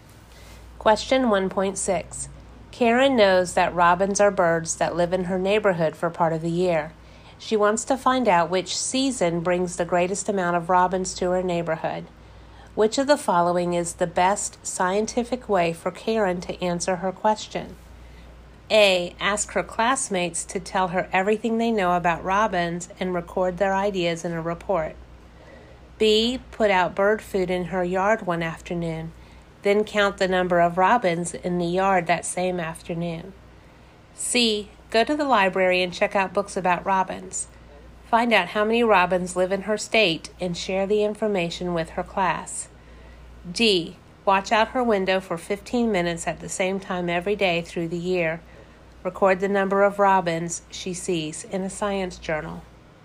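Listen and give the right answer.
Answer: D: Watch out her window for 15 minutes at the same time every day through the year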